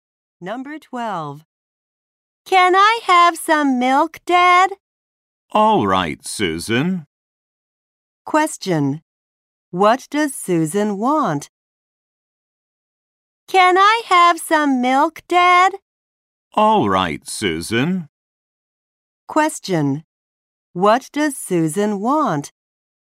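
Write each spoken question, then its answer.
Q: What does Susan want?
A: Some milk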